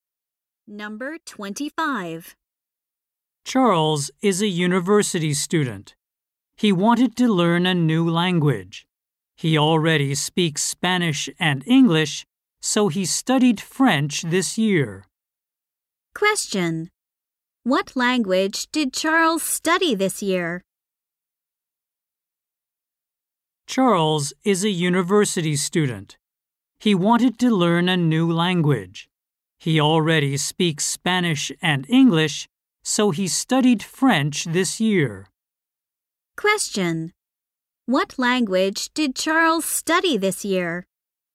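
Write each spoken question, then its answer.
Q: Question. What language did Charles study this year?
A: French.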